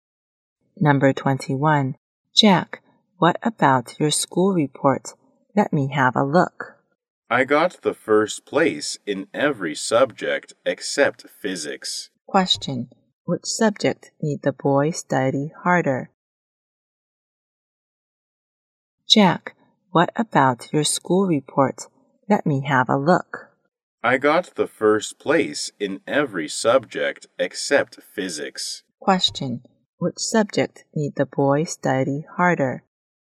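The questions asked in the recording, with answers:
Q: Which subject need the boy study harder?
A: Physics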